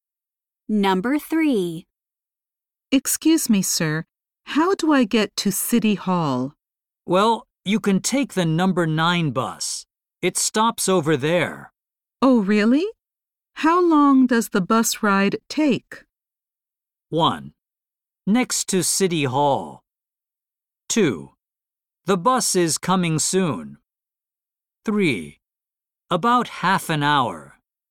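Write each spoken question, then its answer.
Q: Oh, really? How long does the bus ride take?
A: 3: About half an hour.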